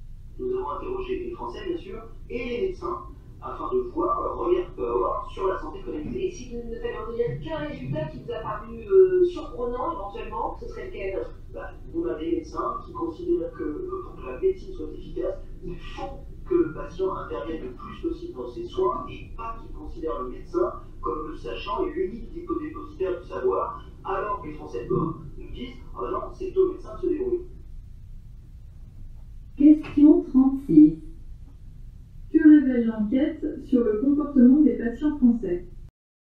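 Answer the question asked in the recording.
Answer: Ils ne veulent pas participer à leurs soins : pour eux, c'est au médecin de s'en occuper.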